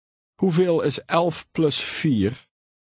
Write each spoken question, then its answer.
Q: Hoeveel is 11 plus 4?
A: 15.